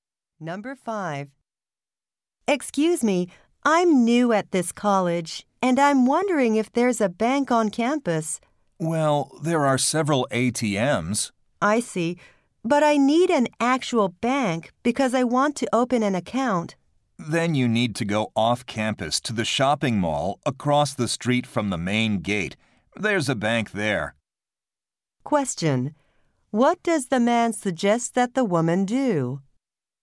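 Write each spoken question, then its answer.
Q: What does the man suggest that the woman do?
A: Go to the bank at the shopping mall across from the main gate.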